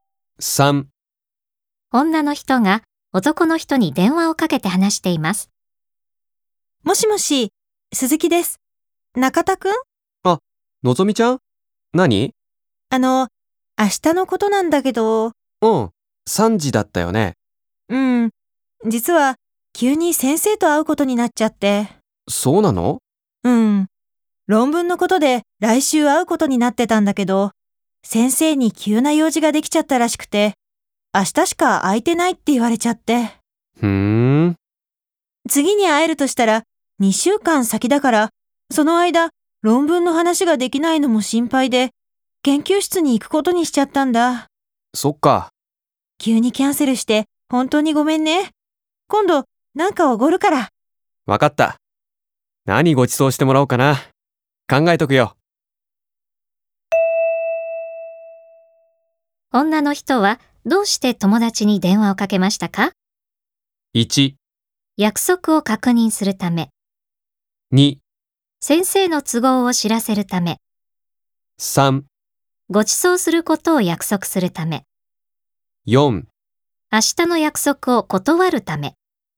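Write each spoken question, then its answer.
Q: 女の人はどうして友達に電話をかけましたか?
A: 4: 明日の約束を断るため。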